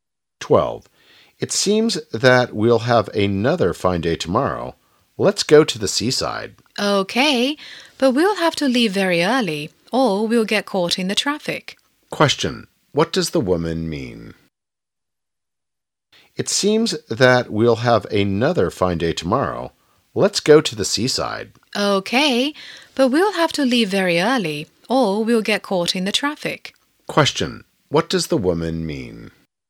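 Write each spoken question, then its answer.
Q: What does the woman mean?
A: They should leave very early to avoid the traffic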